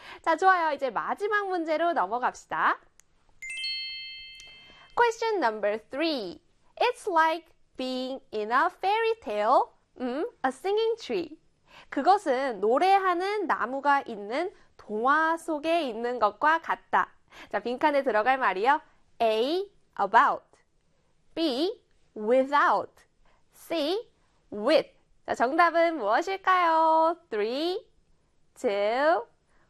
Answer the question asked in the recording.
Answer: 바로 C의 with 골라주셨나요?